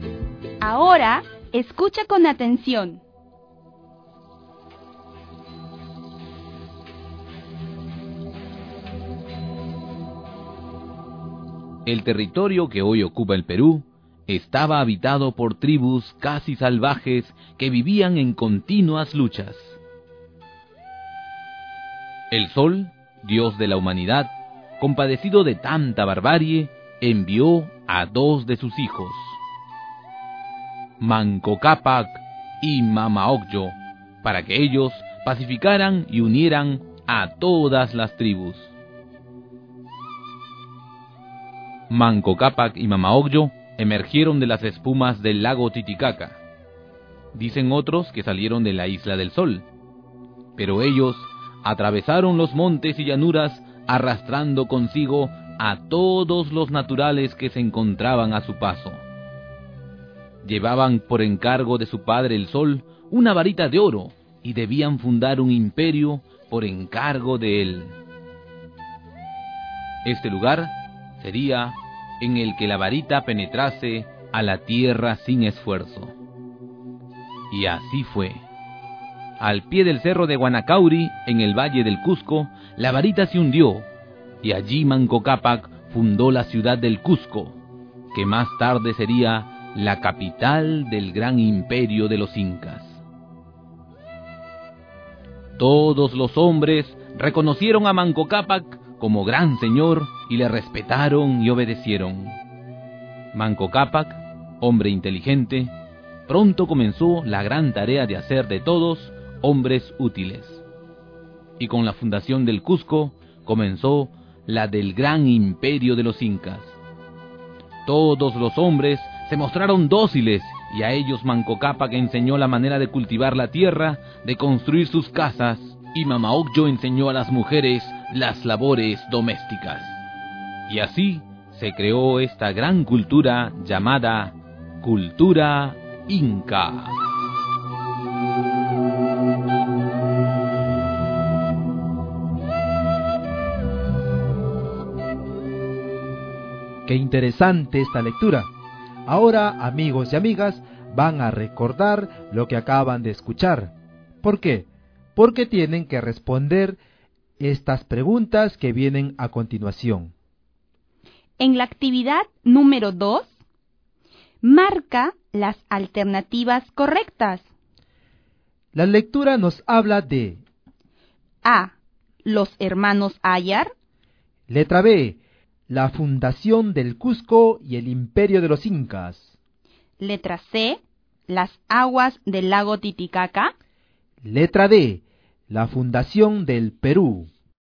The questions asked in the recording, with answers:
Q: La lectura nos habla de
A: Y nos queda la letra B. La lectura nos habla de la fundación del Cusco y el imperio de los Incas.